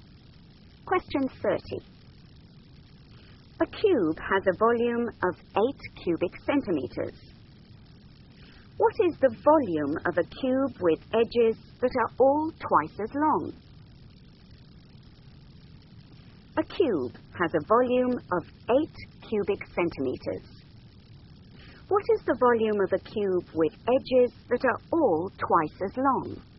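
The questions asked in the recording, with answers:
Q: What is the volume of a cube with edges that are all twice as long?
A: 64 cubic centimeters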